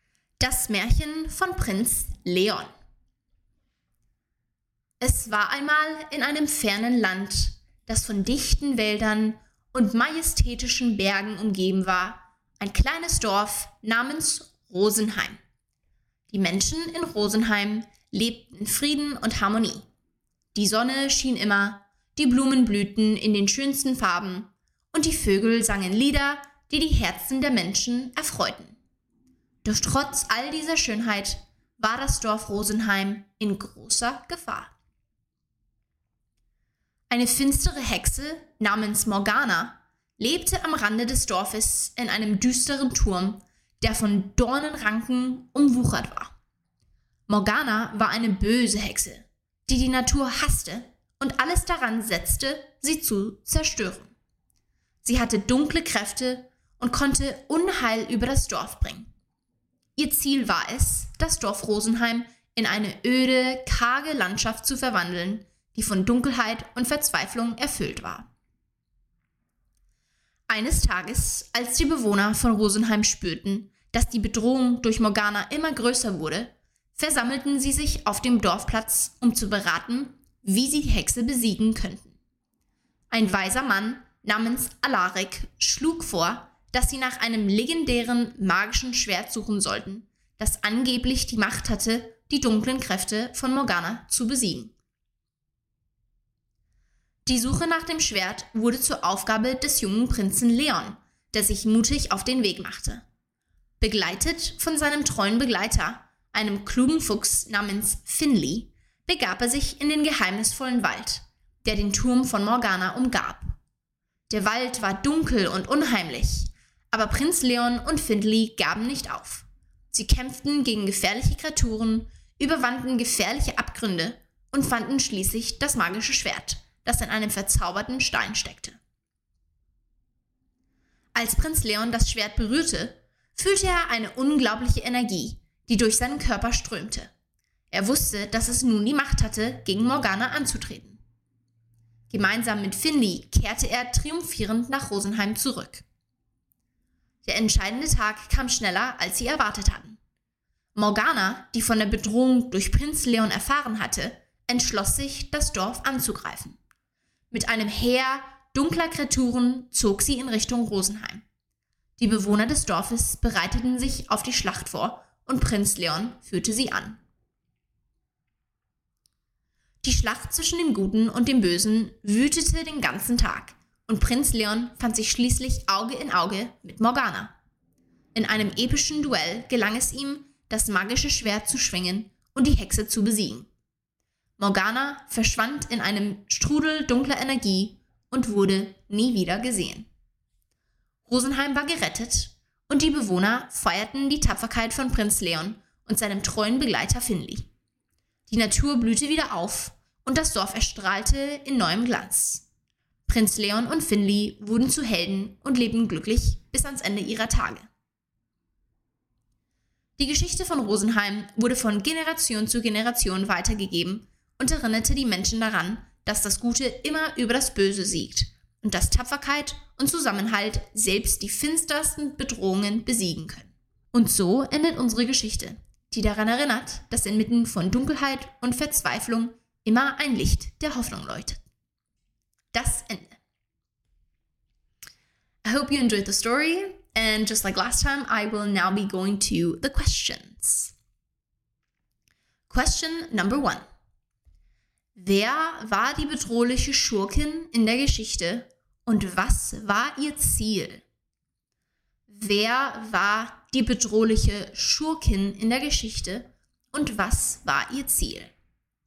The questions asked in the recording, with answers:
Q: Wer war die bedrohliche Schurkin in der Geschichte und was war ihr Ziel?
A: Die bedrohliche Schurkin in der Geschichte war die Hexe Morgana. Ihr Ziel war es, das Dorf Rosenheim in eine öde, karge Landschaft zu verwandeln und die Natur zu zerstören.